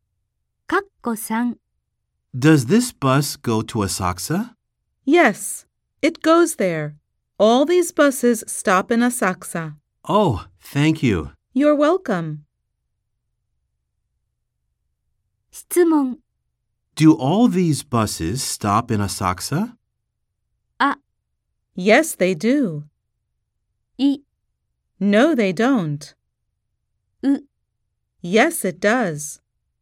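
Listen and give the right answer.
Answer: あ: Yes, they do.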